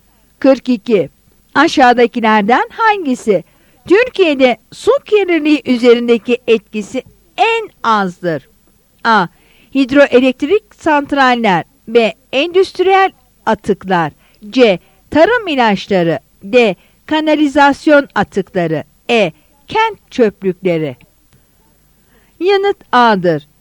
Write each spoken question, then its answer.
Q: Aşağıdakilerden hangisi Türkiye'de su kirliliği üzerindeki etkisi en azdır?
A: Yanıt A'dır.